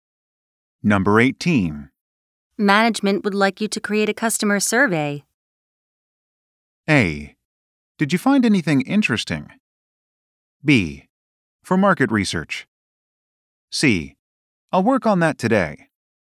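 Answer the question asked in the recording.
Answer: C: I'll work on that today.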